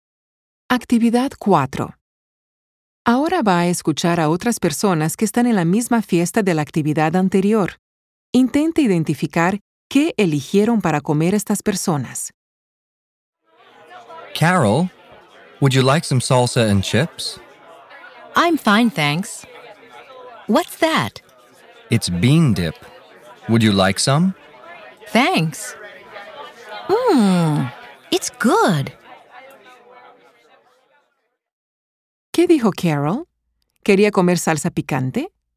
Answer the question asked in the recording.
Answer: Carol no quería salsa picante.